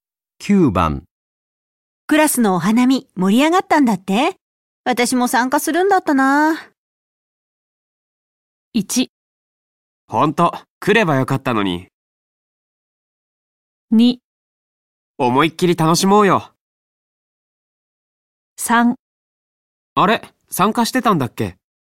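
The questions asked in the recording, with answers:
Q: クラスのお花見盛り上がったんだって私も参加するんだったな。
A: 1: ほんと、来ればよかったのに。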